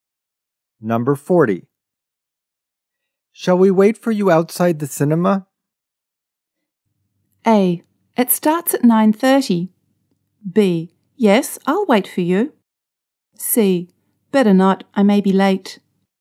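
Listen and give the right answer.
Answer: C: Better not, I may be late.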